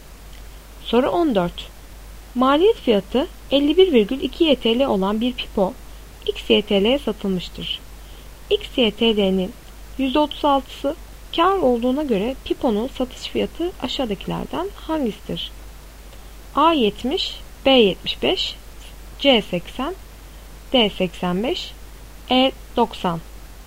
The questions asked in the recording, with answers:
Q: X YTL'nin %36'sı kar olduğuna göre piponun satış fiyatı aşağıdakilerden hangisidir?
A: Doğru cevap C 80.